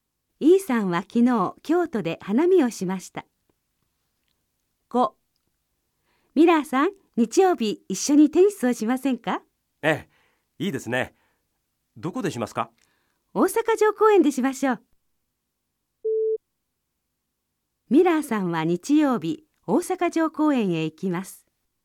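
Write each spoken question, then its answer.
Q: ミラーさんは日曜日大阪城公園へ行きます。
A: ○(正しい)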